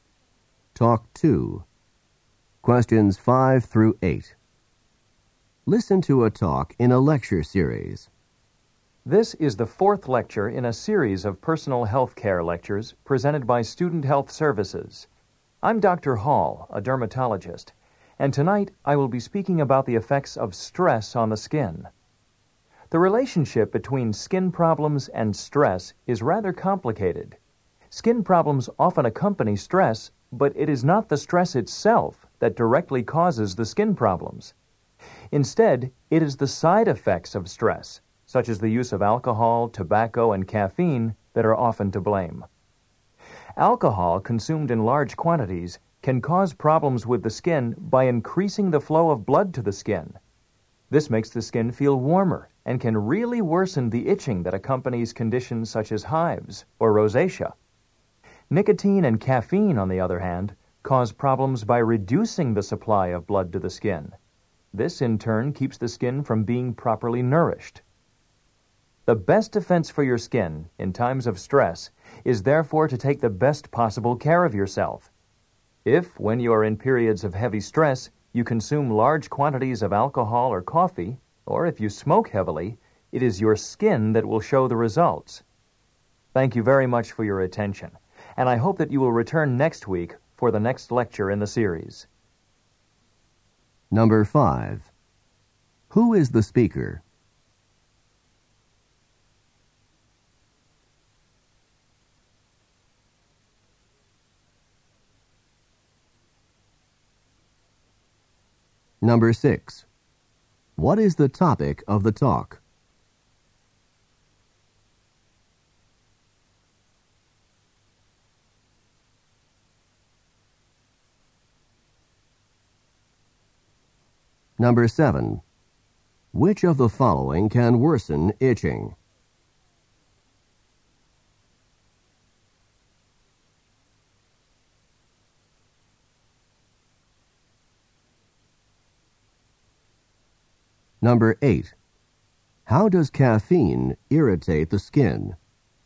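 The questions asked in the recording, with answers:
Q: Who is the speaker?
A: Dr. Hall, a dermatologist

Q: What is the topic of the talk?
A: The effects of stress on the skin

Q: Which of the following can worsen itching?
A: Alcohol

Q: How does caffeine irritate the skin?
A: By reducing the blood supply to the skin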